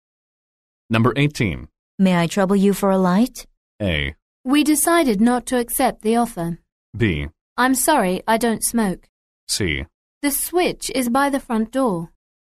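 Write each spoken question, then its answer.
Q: May I trouble you for a light?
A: B: I'm sorry, I don't smoke.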